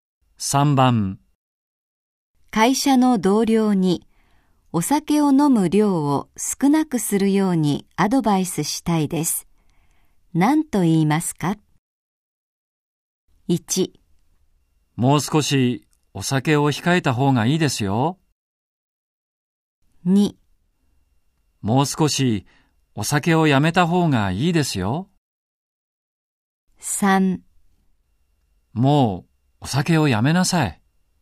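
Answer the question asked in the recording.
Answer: 1: もう少しお酒を控えた方がいいですよ。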